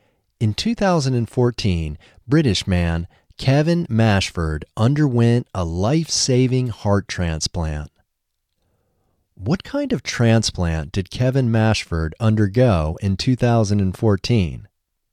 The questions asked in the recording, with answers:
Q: What kind of transplant did Kevin Mashford undergo in 2014?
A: Kevin Mashford underwent a life-saving heart transplant in 2014.